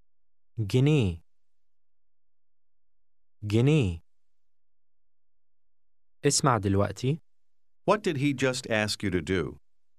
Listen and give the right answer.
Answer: He asked you to listen now.